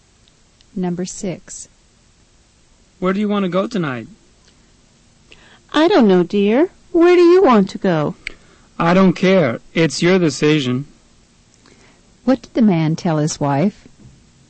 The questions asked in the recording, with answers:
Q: What did the man tell his wife?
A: He said the decision's up to her.